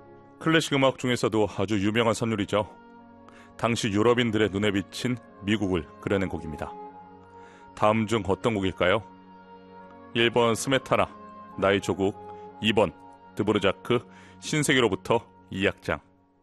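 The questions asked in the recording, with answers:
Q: 다음 중 어떤 곡일까요?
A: 2번: 드브르자크, 신세계로부터 2악장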